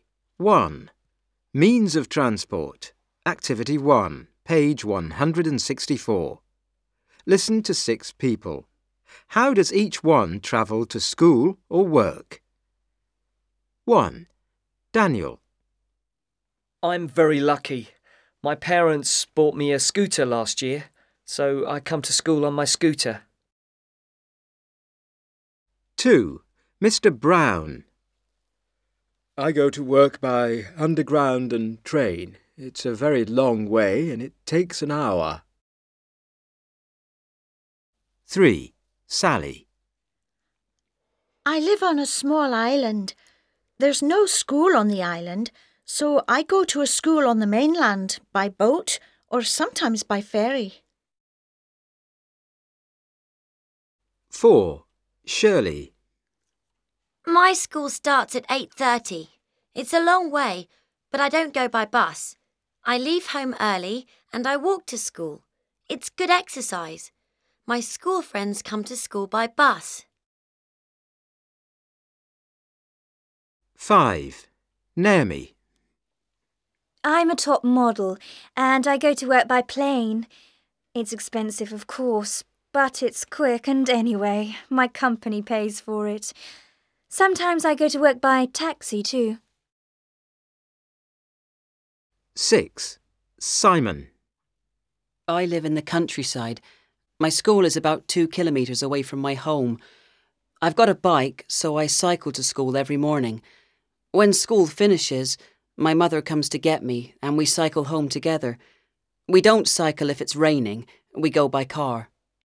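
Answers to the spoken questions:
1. Daniel: by scooter
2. Mr. Brown: by underground and train
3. Sally: by boat or ferry
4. Shirley: on foot (walks)
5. Naomi: by plane (sometimes taxi)
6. Simon: by bike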